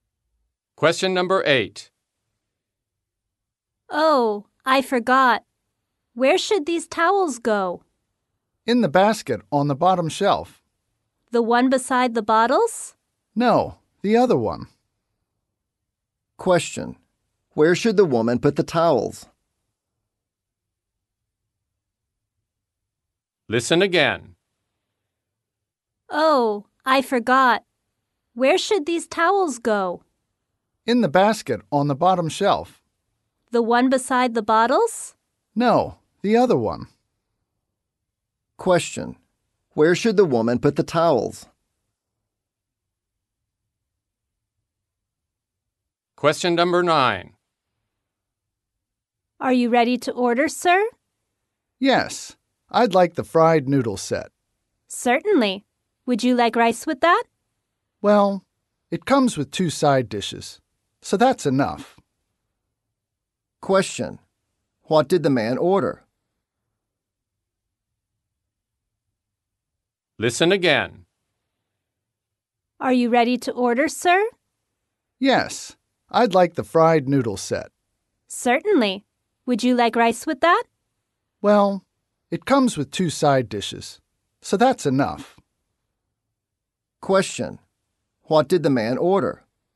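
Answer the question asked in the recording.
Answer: The fried noodle set, with no rice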